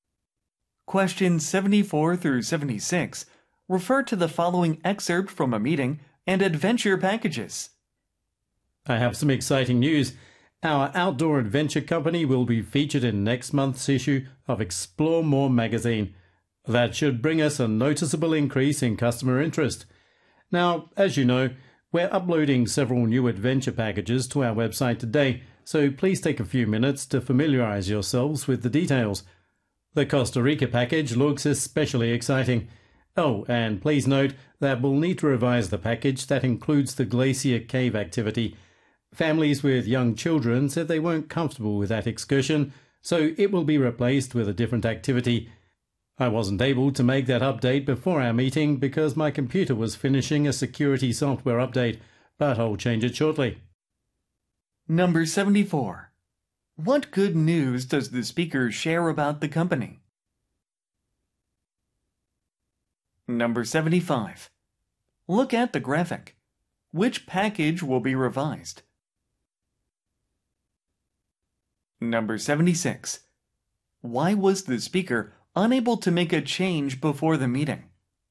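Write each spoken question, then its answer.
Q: What good news does the speaker share about the company?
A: It will be featured in next month's issue of Explore More magazine

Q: Why was the speaker unable to make a change before the meeting?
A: The speaker's computer was finishing a security software update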